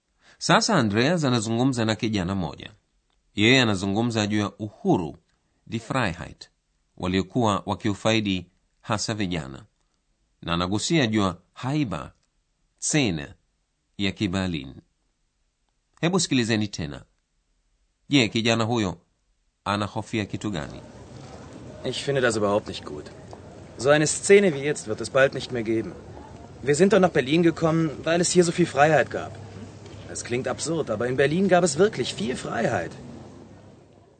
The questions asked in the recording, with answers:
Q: Je, kijana huyo anahofia kitu gani?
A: Kijana huyo anahofia kuwa hali ya haiba ya Berlin haitokuweko tena.